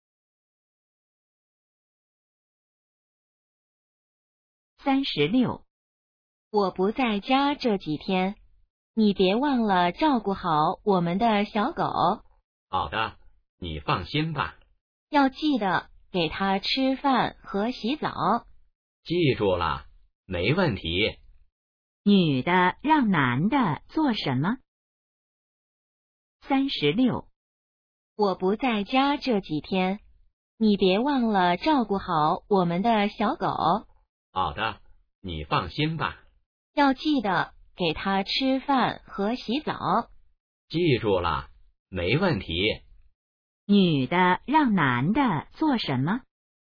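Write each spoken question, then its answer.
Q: 女的让男的做什么?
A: 照顾小狗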